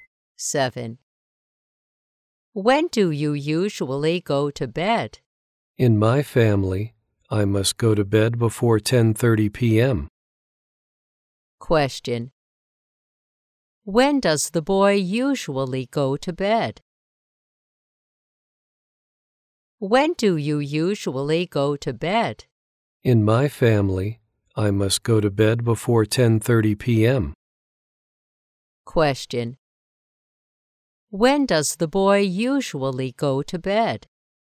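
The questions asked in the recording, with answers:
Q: When does the boy usually go to bed?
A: Before 10:30 p.m.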